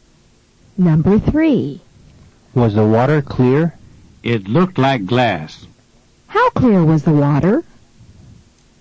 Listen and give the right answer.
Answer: The water was as clear as glass.